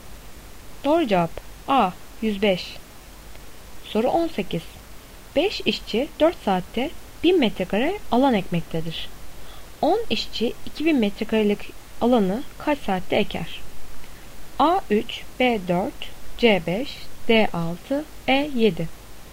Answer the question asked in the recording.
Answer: Doğru cevap B 4.